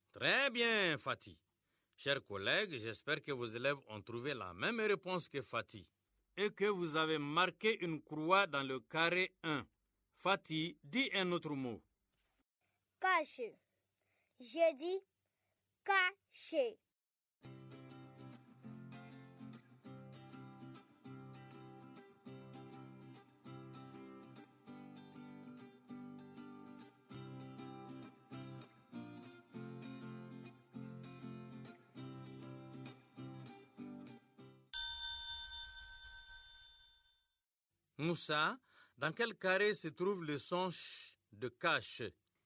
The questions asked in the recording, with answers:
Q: Moussa, dans quel carré se trouve le son ch de cache?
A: Dans le carré 2, parce que le son ch est dans la deuxième syllabe.